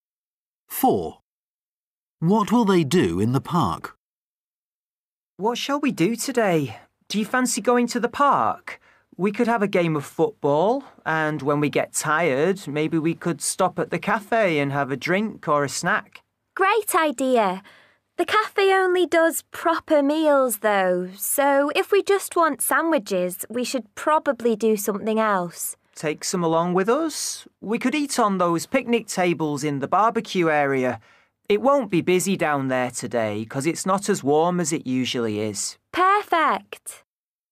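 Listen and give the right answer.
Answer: Play football and have a picnic of sandwiches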